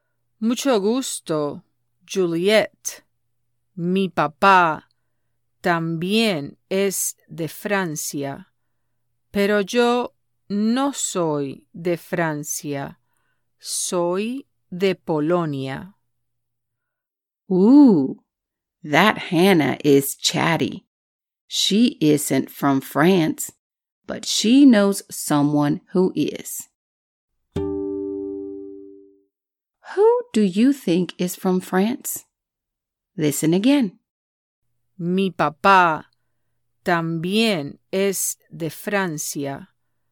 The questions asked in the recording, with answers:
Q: Who do you think is from France?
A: If you said her dad is from France, you are correct.